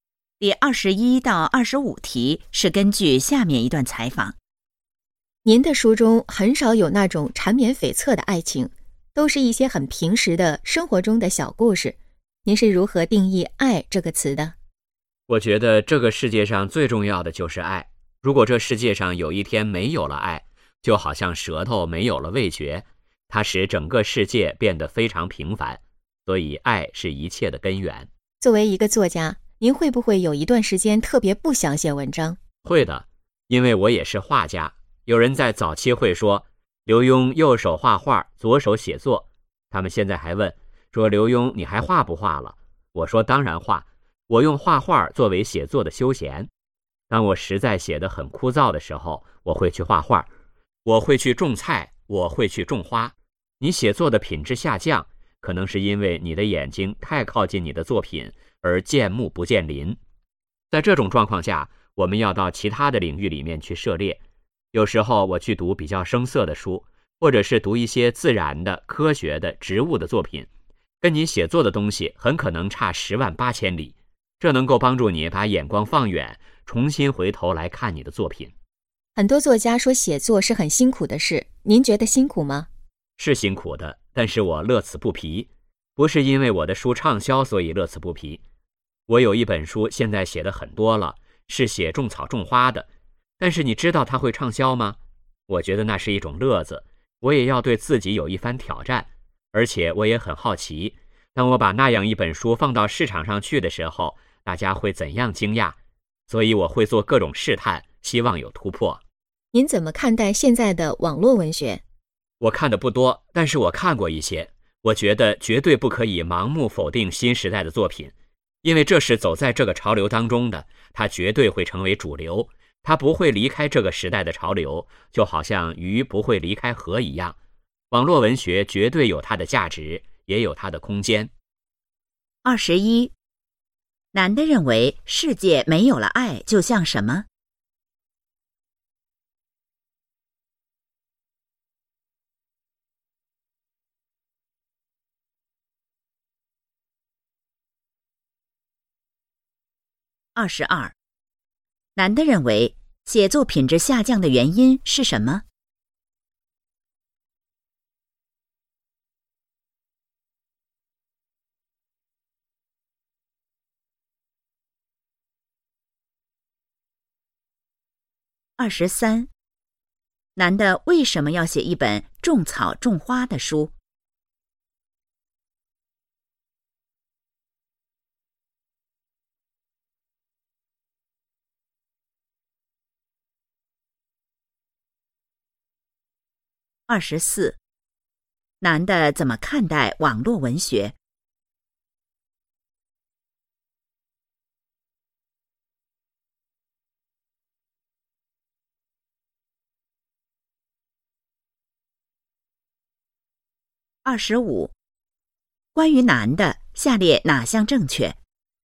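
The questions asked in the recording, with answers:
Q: 男的认为世界没有了爱就像什么?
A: 就像舌头没有了味觉

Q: 男的认为写作品质下降的原因是什么?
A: 眼睛太靠近作品,见木不见林

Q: 男的为什么要写一本种草种花的书?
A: 觉得是一种乐子,也想挑战自己

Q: 男的怎么看待网络文学?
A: 不可盲目否定,它有价值,会成为主流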